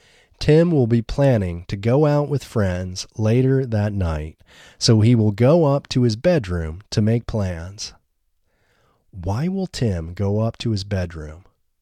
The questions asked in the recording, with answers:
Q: Why will Tim go up to his bedroom?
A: Tim will go up to his bedroom to make plans.